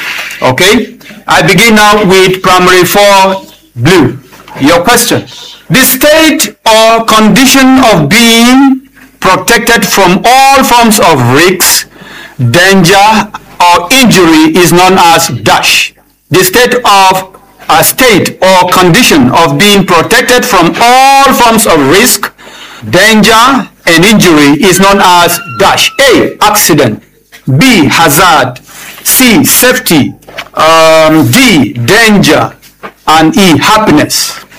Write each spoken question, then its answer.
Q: The state or condition of being protected from all forms of risk, danger, or injury is known as dash.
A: C, safety.